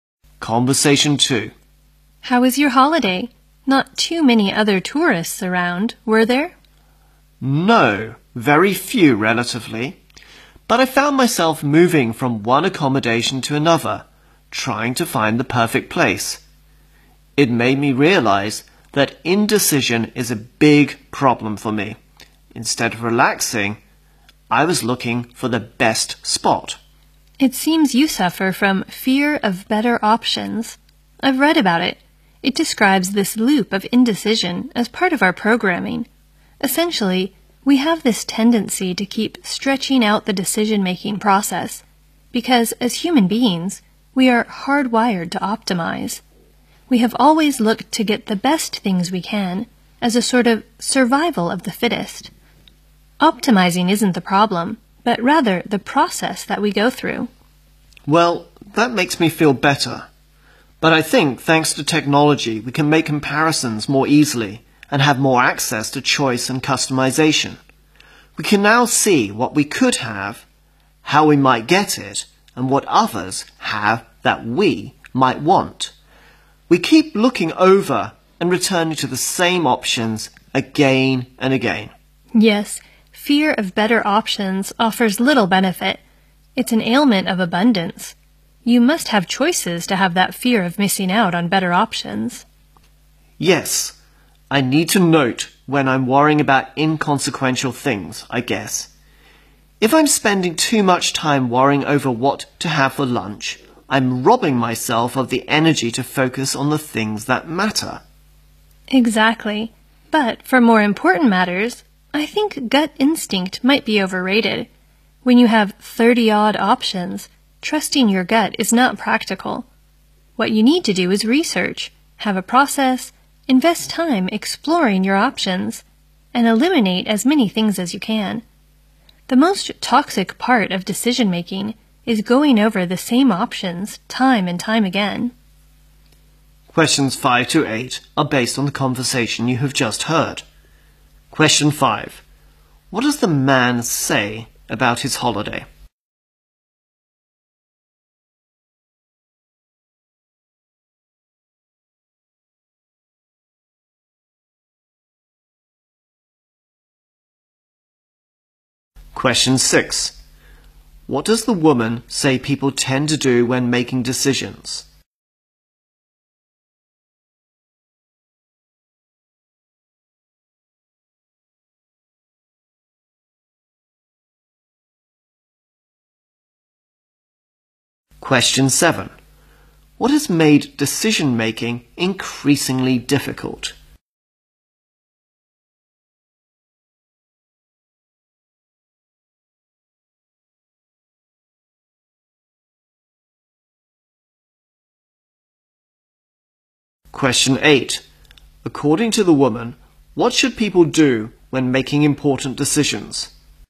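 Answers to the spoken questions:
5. He kept moving from one place to stay to another, trying to find the perfect place.
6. They keep stretching out the decision-making process because they want to optimize.
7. Technology, which makes comparing easier and gives more choices.
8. Do research, have a process, take time to explore options and eliminate as many as possible.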